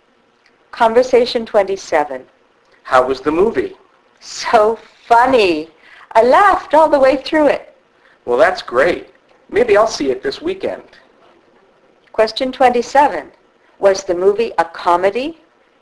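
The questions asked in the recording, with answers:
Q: Was the movie a comedy?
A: Yes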